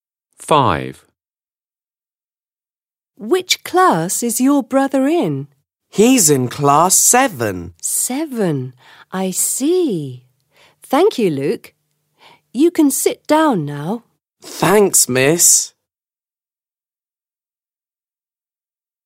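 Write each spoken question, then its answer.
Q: Which class is your brother in?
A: Class 7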